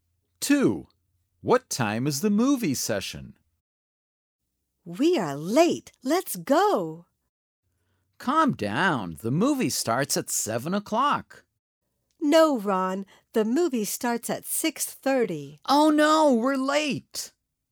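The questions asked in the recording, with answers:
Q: What time is the movie session?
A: 6:30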